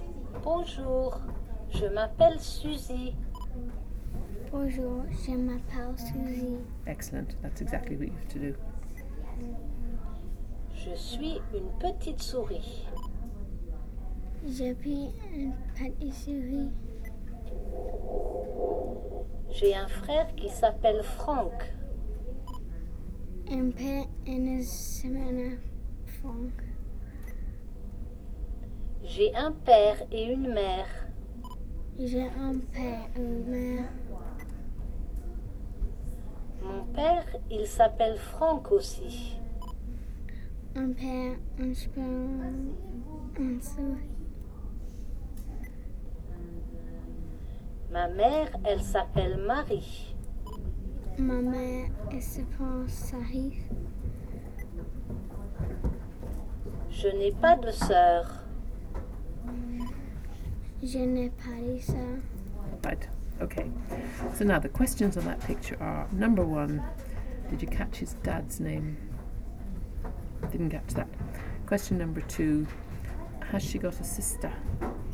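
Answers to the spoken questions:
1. Franck
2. No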